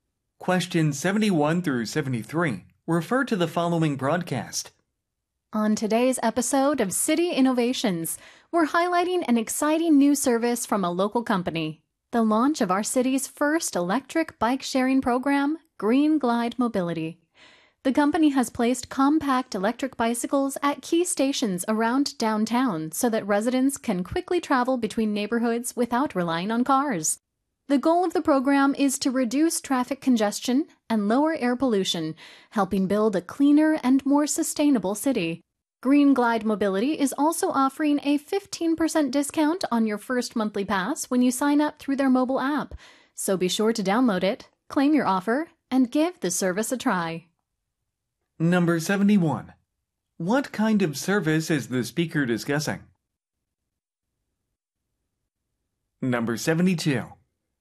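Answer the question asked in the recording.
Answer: An electric bike sharing program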